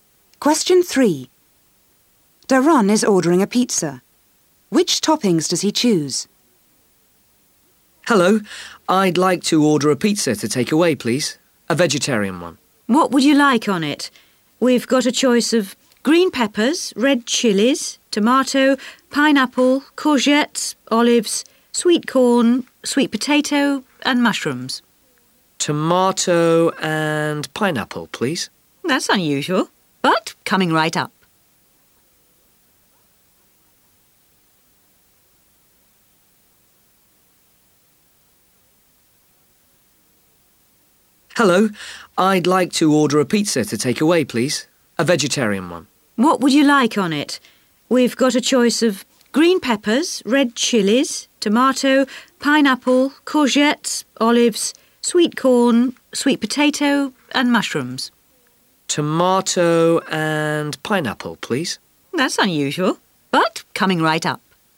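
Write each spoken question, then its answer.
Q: Which toppings does he choose?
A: Tomato and pineapple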